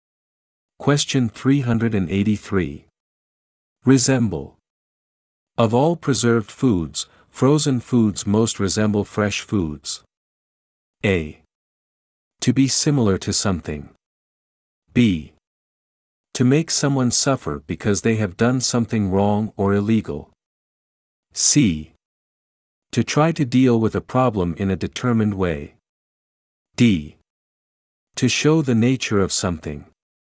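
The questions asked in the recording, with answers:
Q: Resemble. Of all preserved foods, frozen foods most resemble fresh foods.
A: A: To be similar to something.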